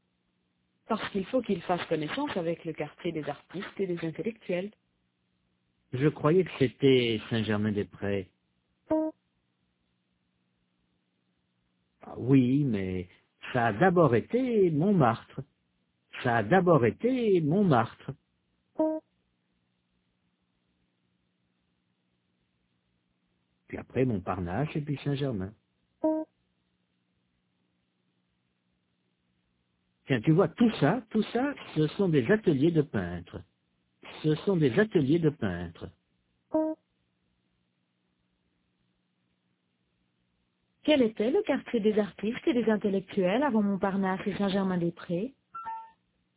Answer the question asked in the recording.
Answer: Montmartre.